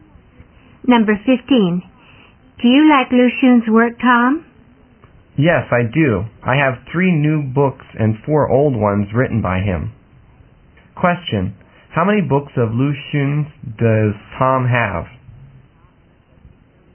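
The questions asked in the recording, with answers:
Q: How many books of Lu Xun's does Tom have?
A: Seven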